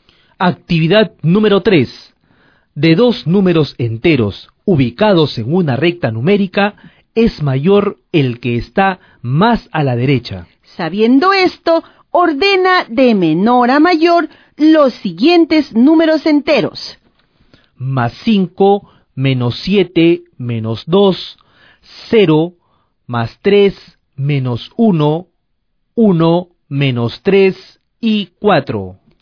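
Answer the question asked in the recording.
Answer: -7, -3, -2, -1, 0, 1, 3, 4, 5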